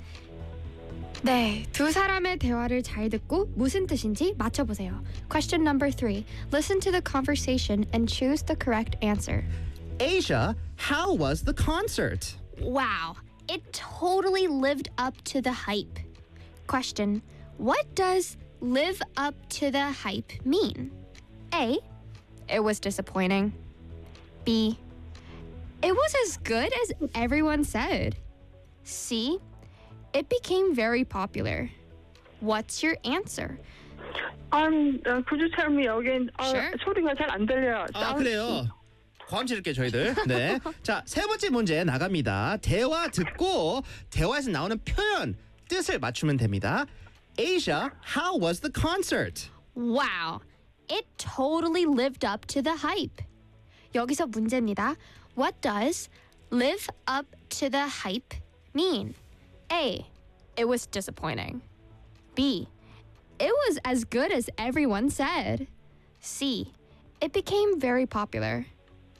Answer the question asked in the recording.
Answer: Live up to the hype 뜻은요.